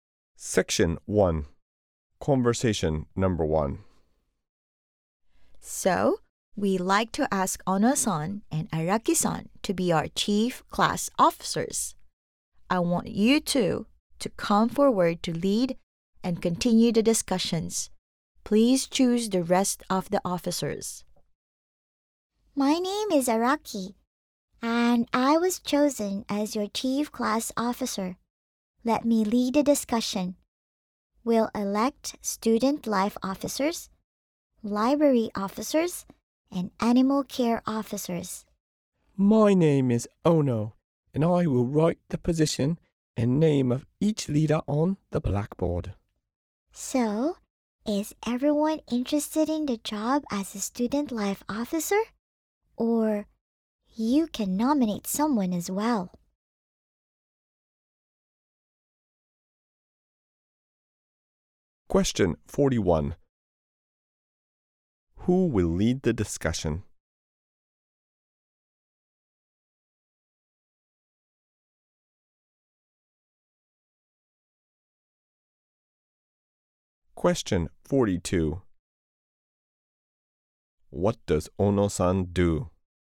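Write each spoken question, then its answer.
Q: Who will lead the discussion?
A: Araki-san

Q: What does Ono-san do?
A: She writes each position and name on the blackboard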